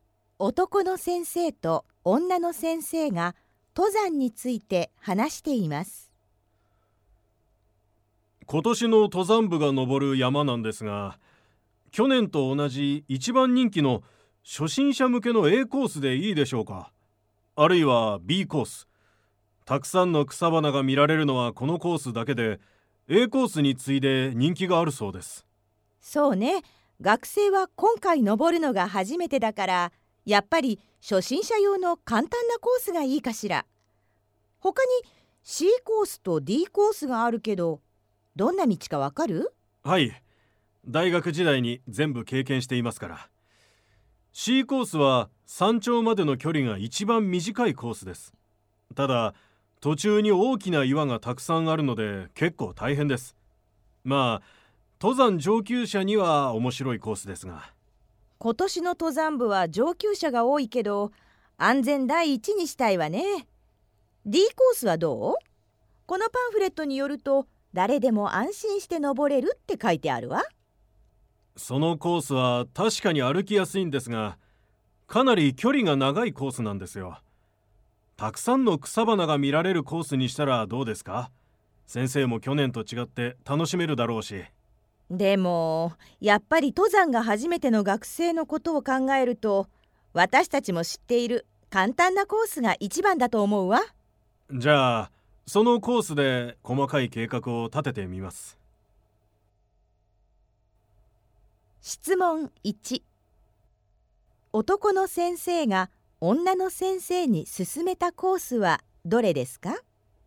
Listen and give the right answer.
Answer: 一番いい答えは B です。